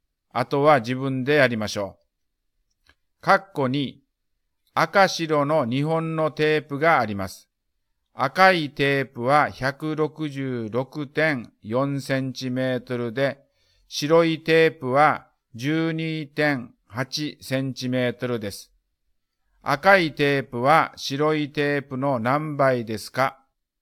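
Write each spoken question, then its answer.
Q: 赤いテープは白いテープの何倍ですか?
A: 13倍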